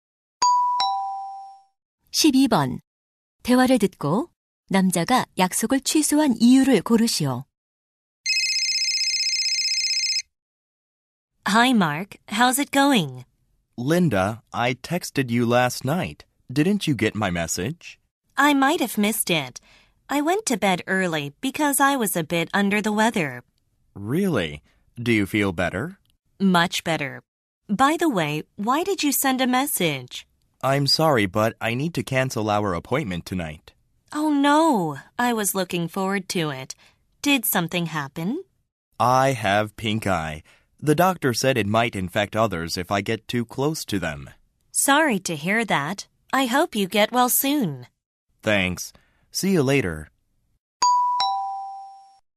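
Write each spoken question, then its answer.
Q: 대화를 듣고 남자가 약속을 취소한 이유를 고르시오.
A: 눈병(결막염)에 걸려서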